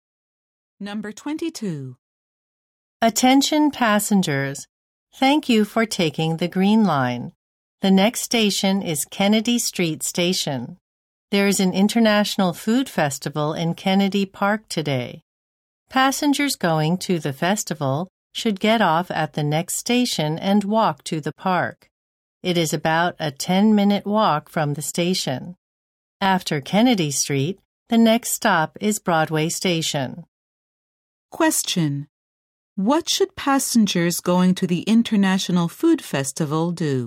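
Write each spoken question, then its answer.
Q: What should passengers going to the International Food Festival do?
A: Get off at Kennedy Street Station and walk to the park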